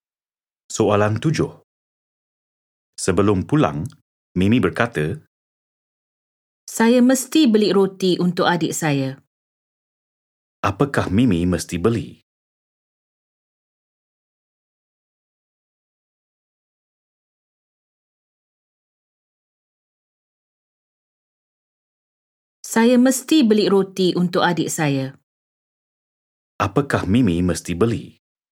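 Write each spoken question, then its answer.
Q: Apakah Mimi mesti beli?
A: roti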